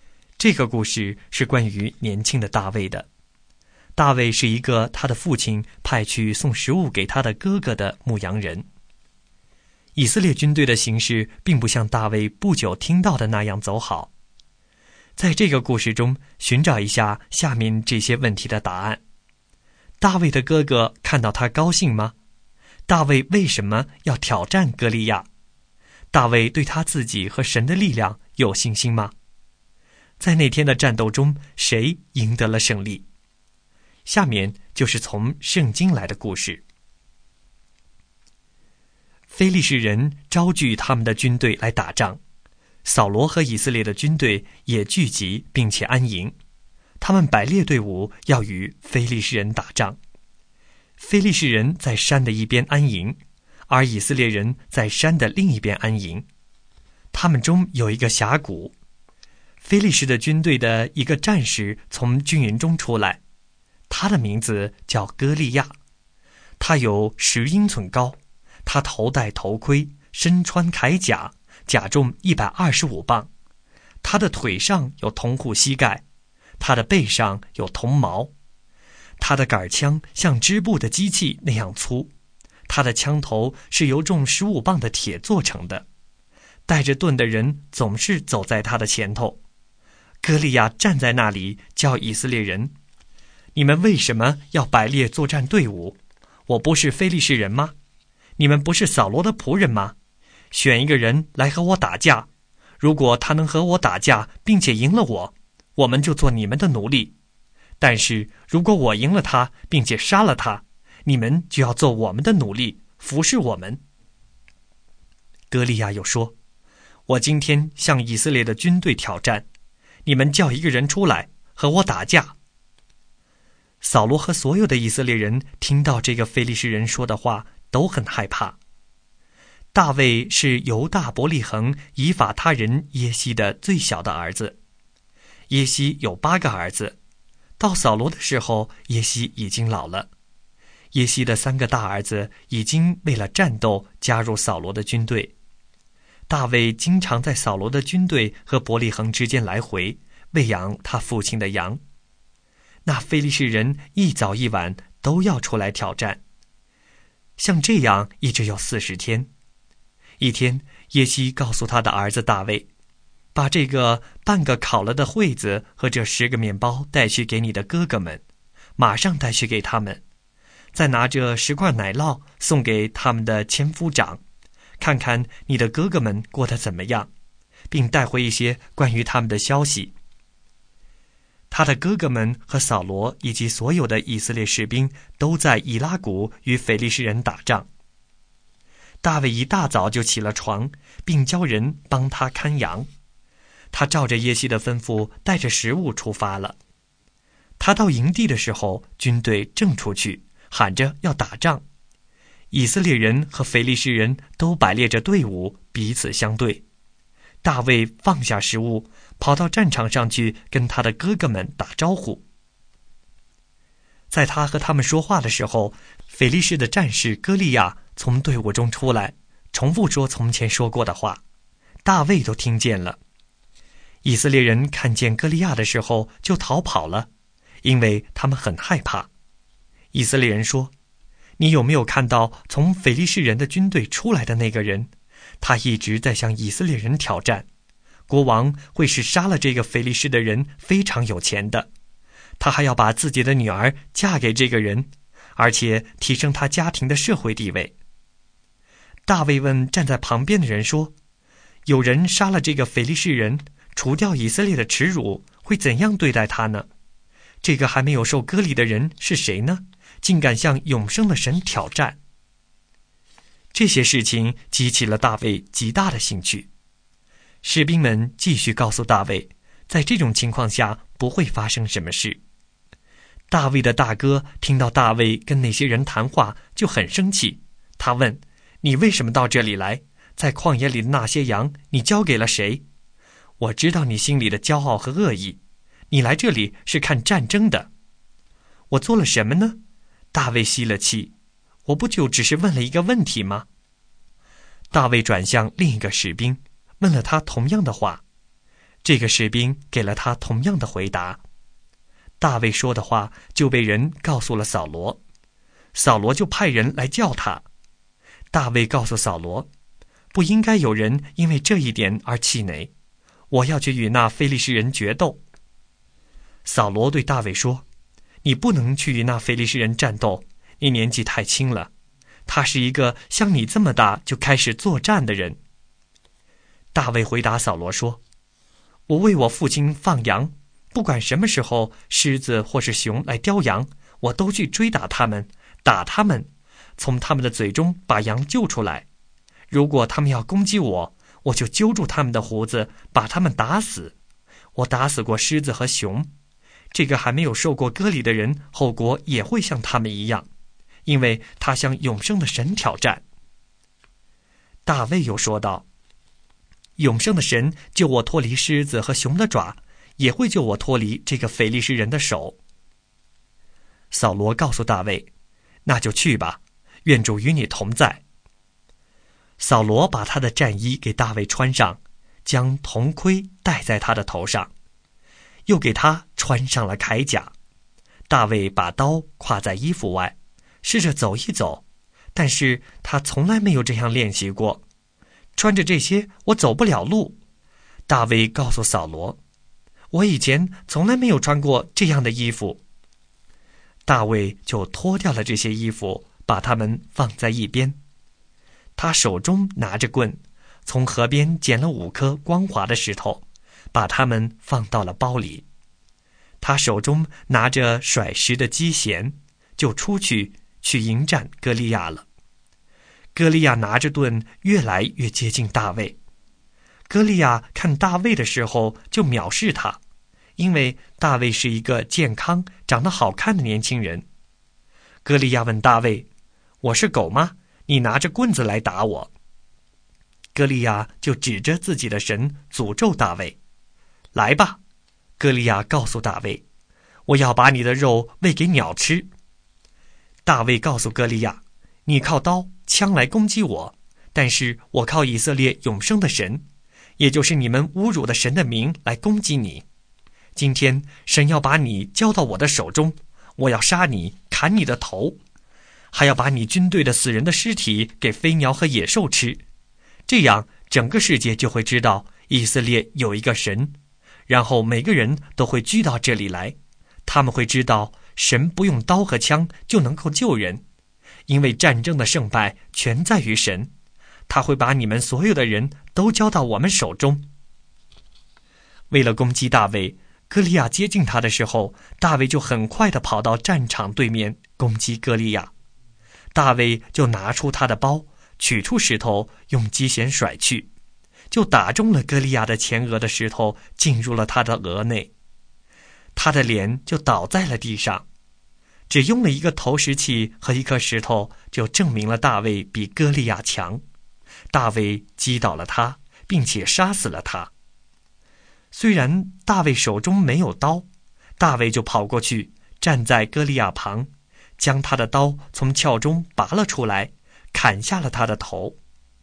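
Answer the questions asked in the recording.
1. 不高兴,他很生气
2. 因为歌利亚向永生的神挑战,侮辱以色列
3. 有,他相信神会救他
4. 大卫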